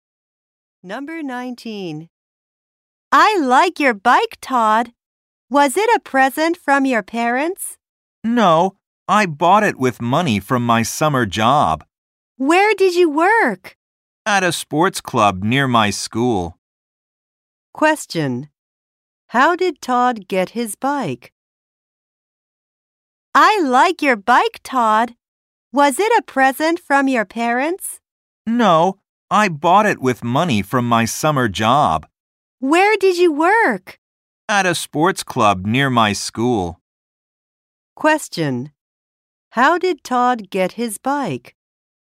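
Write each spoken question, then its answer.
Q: How did Todd get his bike?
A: He bought it with money from his summer job.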